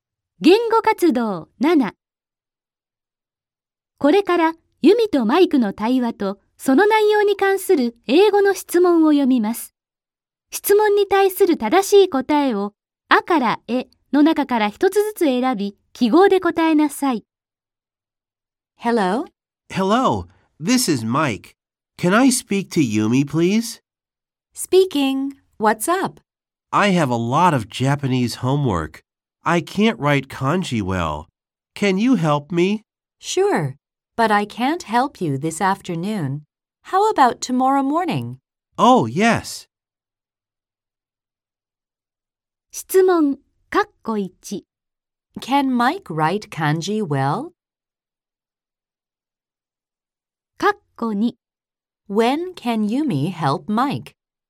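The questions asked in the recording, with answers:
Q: Can Mike write kanji well?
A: No, he can't.

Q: When can Yumi help Mike?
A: Tomorrow morning.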